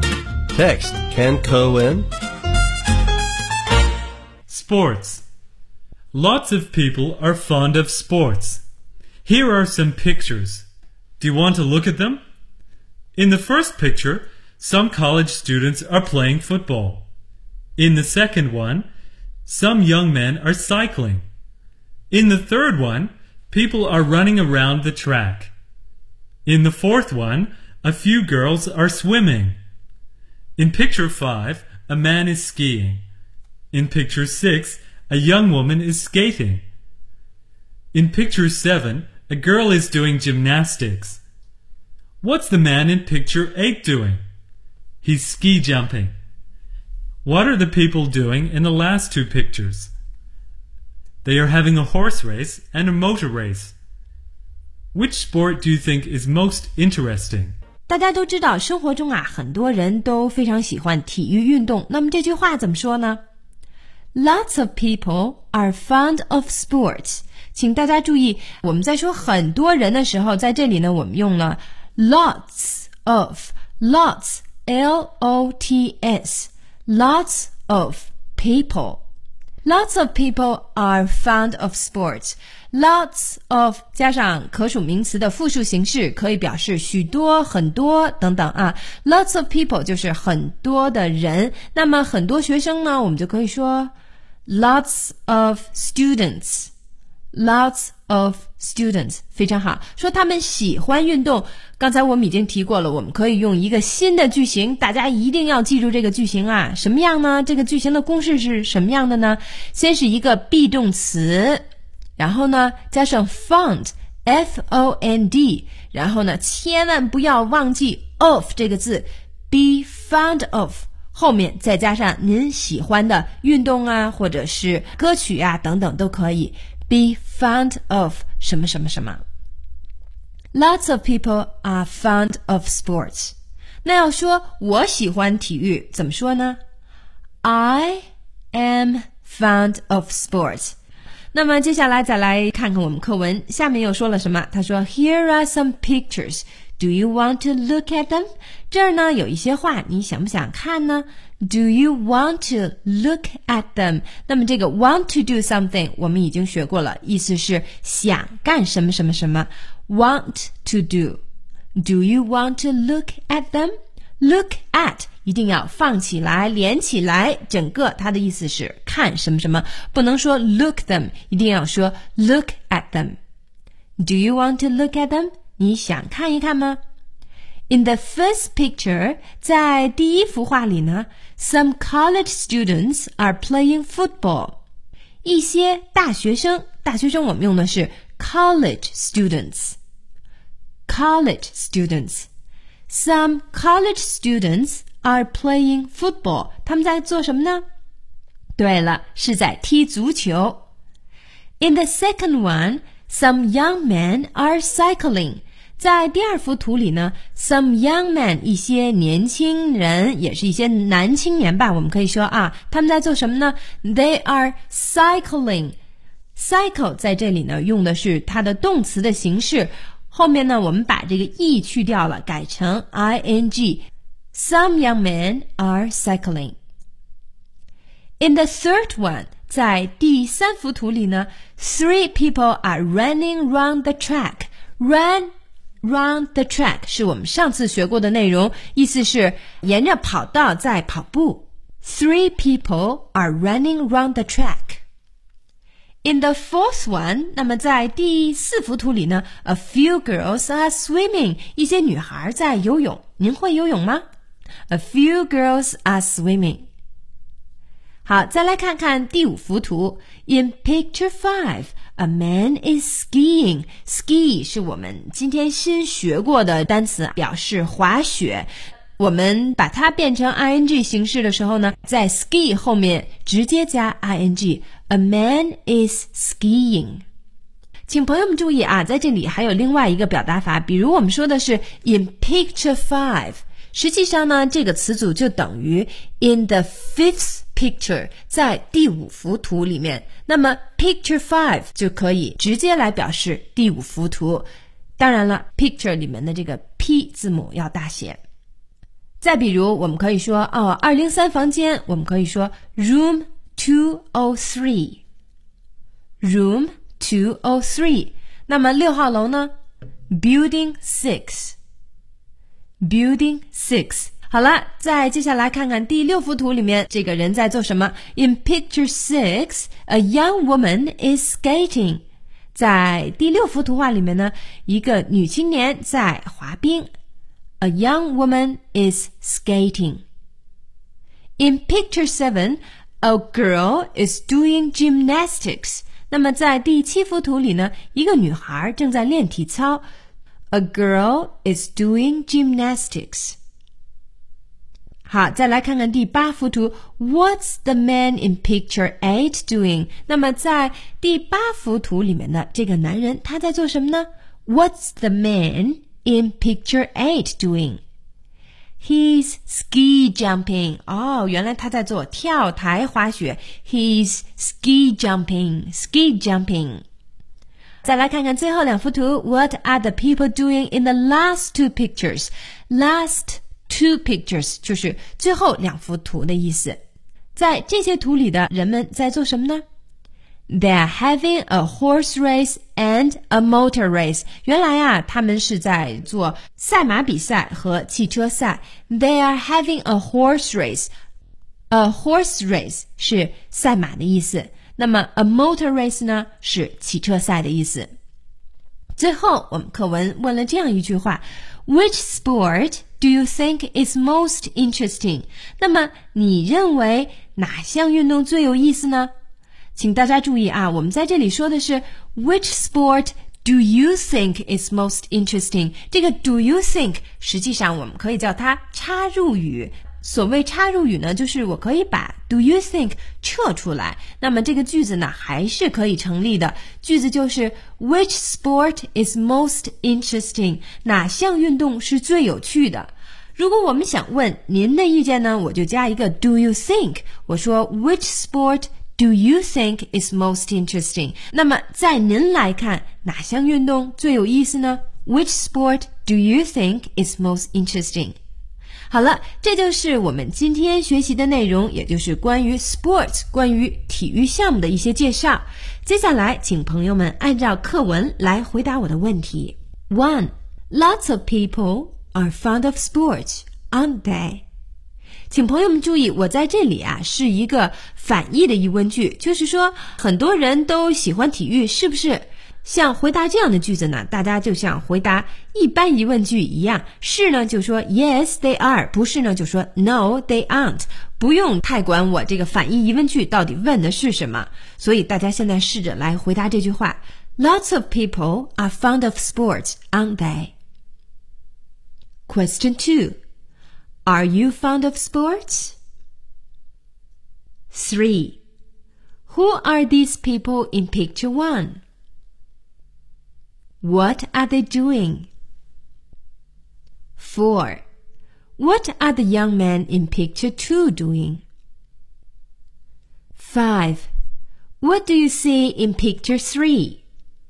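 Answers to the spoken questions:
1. Yes, they are.
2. They are college students.
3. They are playing football.
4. They are cycling.
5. People running round the track.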